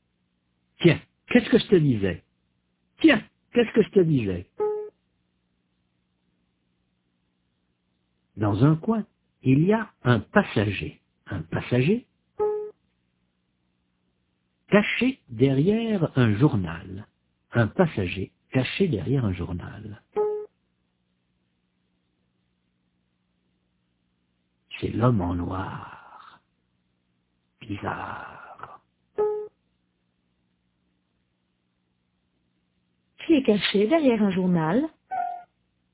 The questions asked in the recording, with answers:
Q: Qui est caché derrière un journal?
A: L'homme en noir.